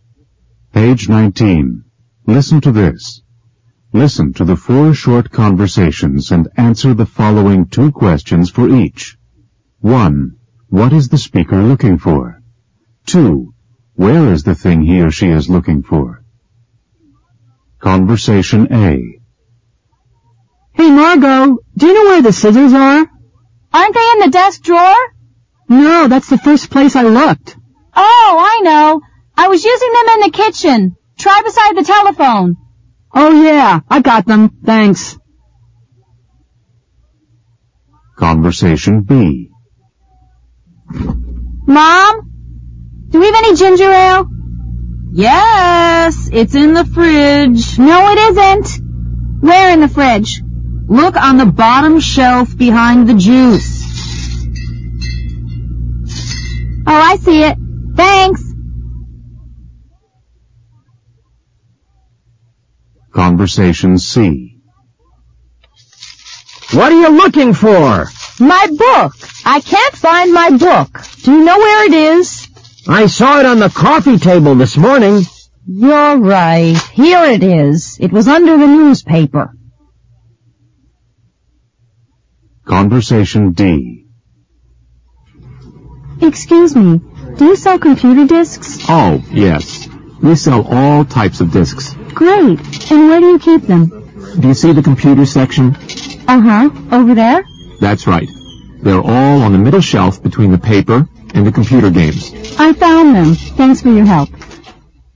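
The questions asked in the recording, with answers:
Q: What is the speaker looking for?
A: The scissors

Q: Where is the thing he or she is looking for?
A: Beside the telephone in the kitchen

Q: What is the speaker looking for?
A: Ginger ale

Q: Where is the thing he or she is looking for?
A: On the bottom shelf of the fridge, behind the juice

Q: What is the speaker looking for?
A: A book

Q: Where is the thing he or she is looking for?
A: On the coffee table, under the newspaper

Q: What is the speaker looking for?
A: Computer discs

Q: Where is the thing he or she is looking for?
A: On the middle shelf between the paper and the computer games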